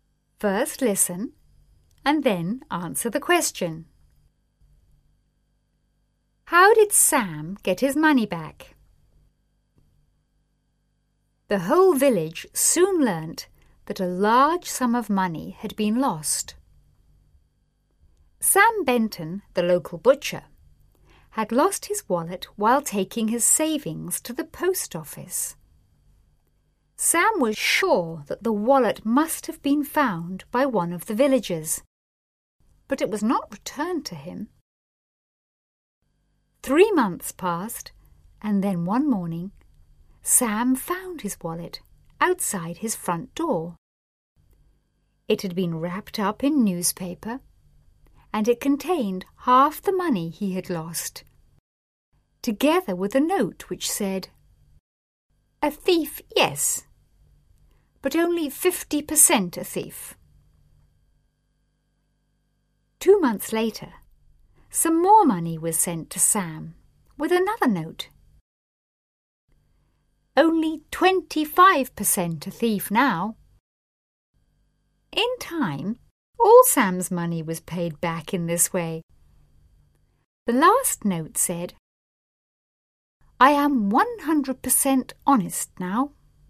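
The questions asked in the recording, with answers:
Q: How did Sam get his money back?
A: The thief returned it in instalments, left with notes (half first, then more later, until all was paid back).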